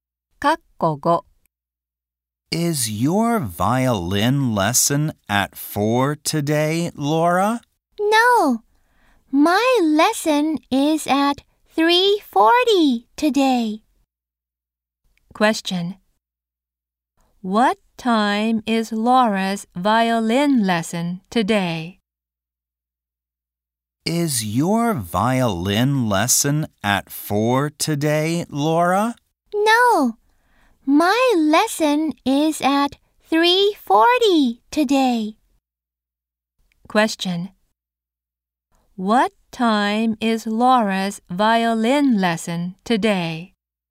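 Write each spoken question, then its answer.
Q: What time is Laura's violin lesson today?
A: At 3:40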